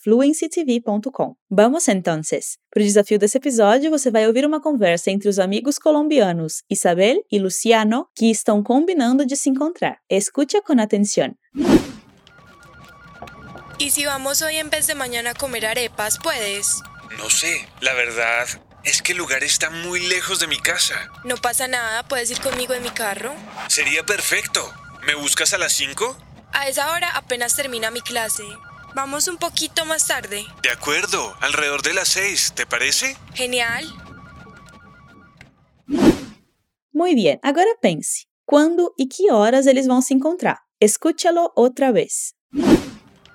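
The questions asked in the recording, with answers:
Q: ¿Cuándo y qué horas ellos van a se encontrar?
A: Hoje (em vez de amanhã), por volta das 6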